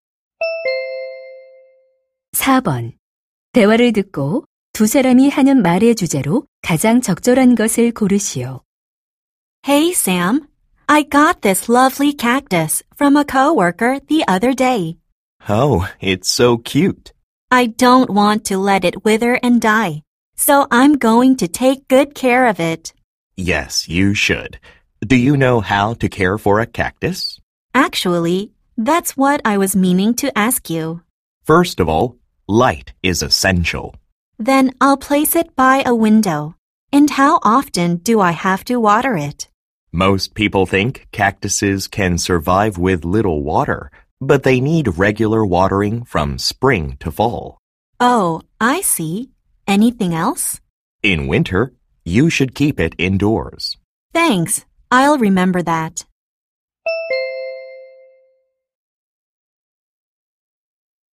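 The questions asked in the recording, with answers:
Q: 대화를 듣고 두 사람이 하는 말의 주제로 가장 적절한 것을 고르시오.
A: 선인장 키우는 방법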